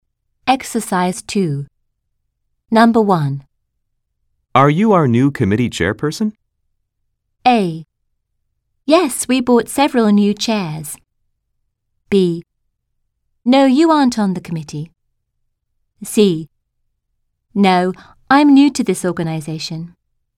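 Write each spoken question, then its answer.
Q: Are you our new committee chairperson?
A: C: No, I'm new to this organization.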